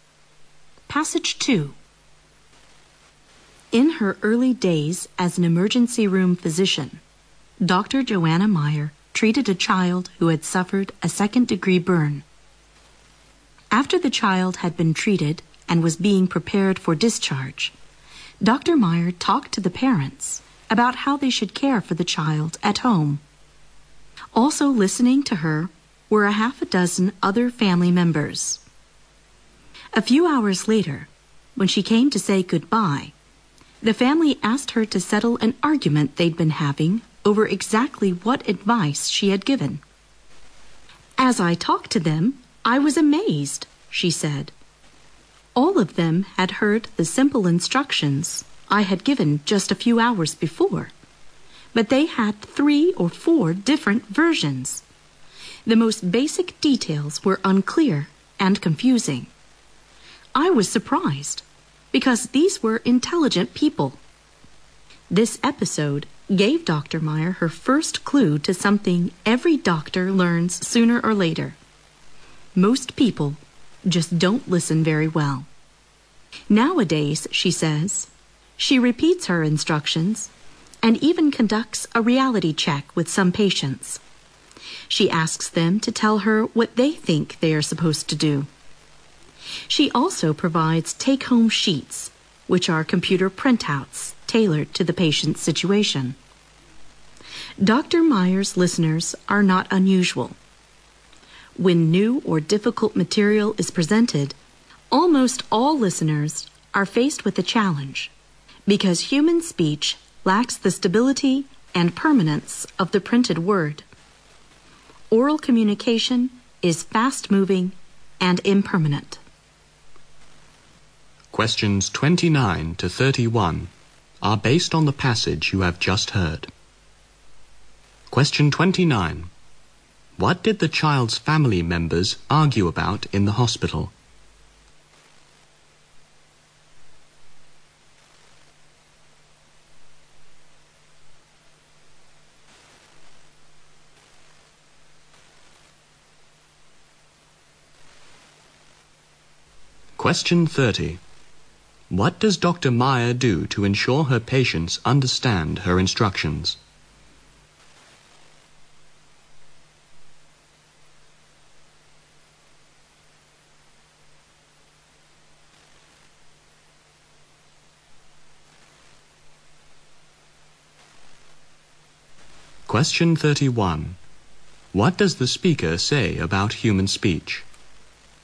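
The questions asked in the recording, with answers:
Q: What did the child's family members argue about in the hospital?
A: What advice the doctor had given

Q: What does Dr.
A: She repeats instructions, asks patients to tell her what to do, and gives take-home sheets

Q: What does the speaker say about human speech?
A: It lacks the stability and permanence of the printed word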